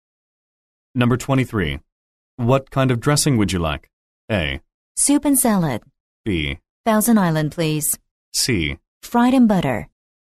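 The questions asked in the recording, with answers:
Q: What kind of dressing would you like?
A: B: Thousand Island, please.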